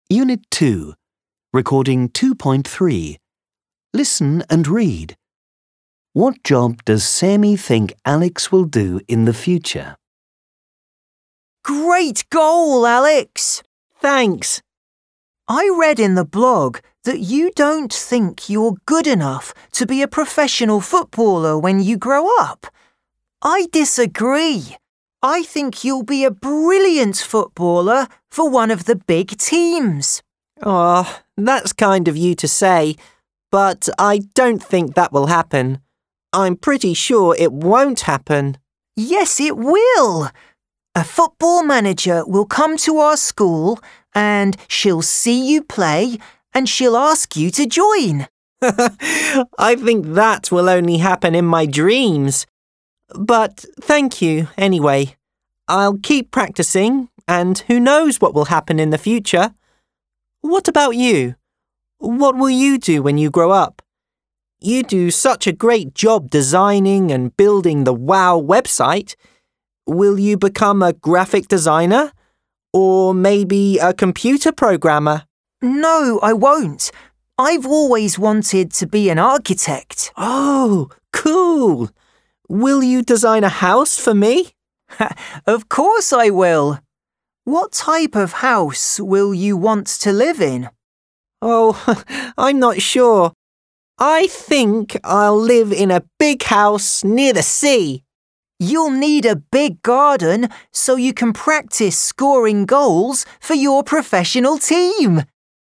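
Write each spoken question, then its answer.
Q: What job does Sammy think Alex will do in the future?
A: A professional footballer for one of the big teams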